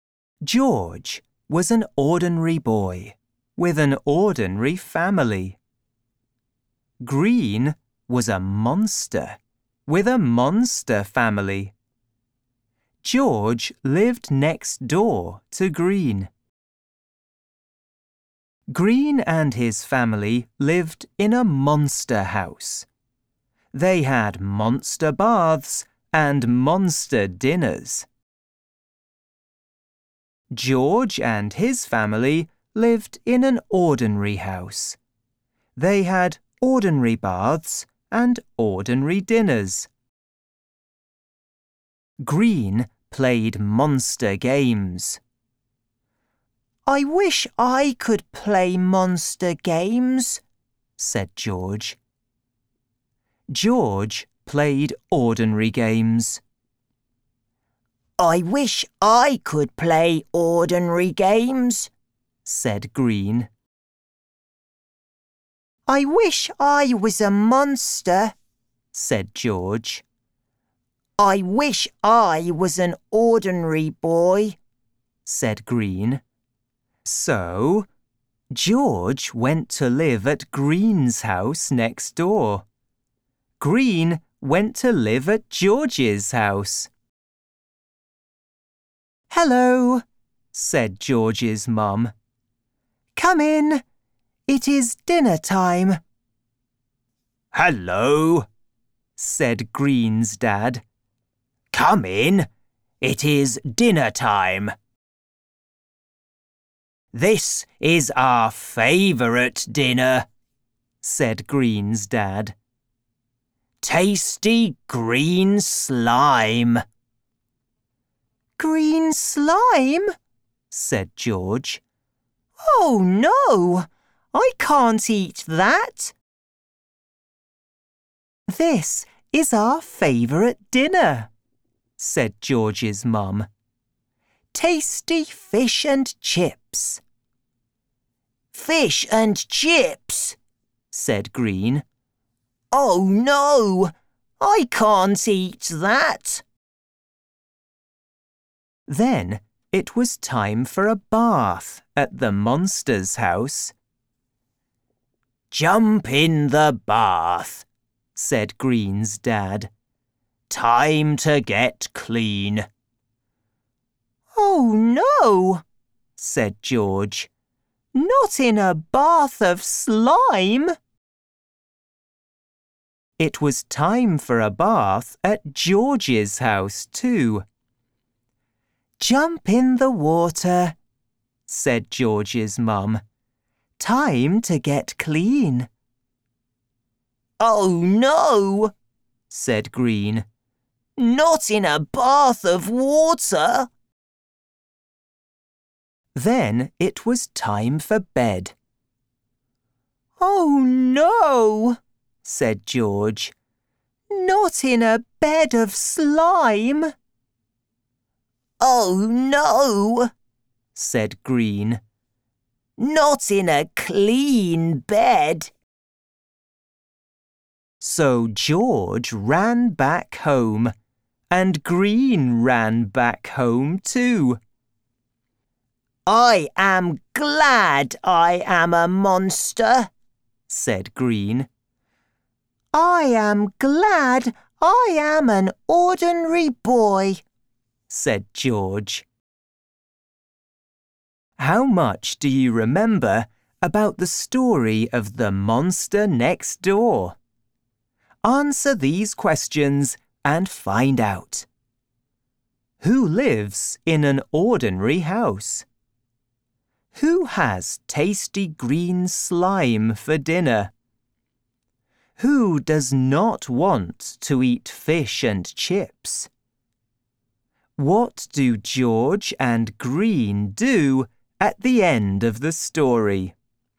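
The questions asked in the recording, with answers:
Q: Who lives in an ordinary house?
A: George and his family

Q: Who has tasty green slime for dinner?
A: Green and his family (the monsters)

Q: Who does not want to eat fish and chips?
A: Green

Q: What do George and Green do at the end of the story?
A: They run back home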